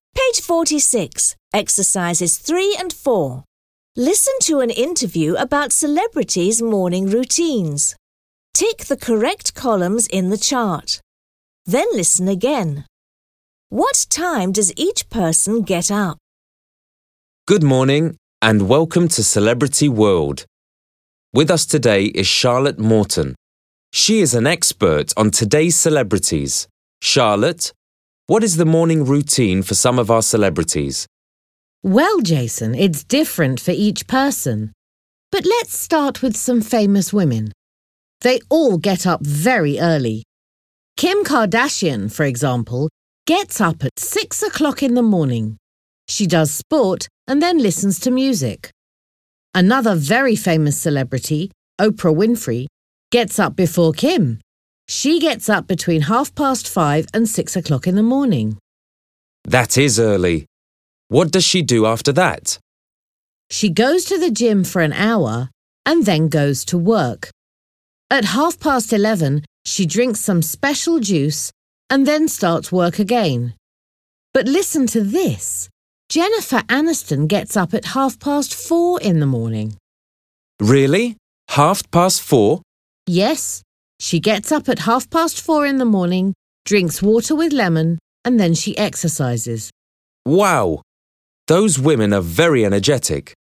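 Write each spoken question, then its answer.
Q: What time does each person get up?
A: Kim Kardashian at 6:00, Oprah Winfrey between 5:30 and 6:00, Jennifer Aniston at 4:30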